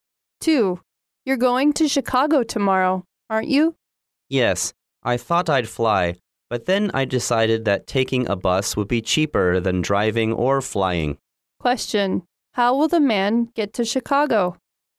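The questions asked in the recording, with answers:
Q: How will the man get to Chicago?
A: By bus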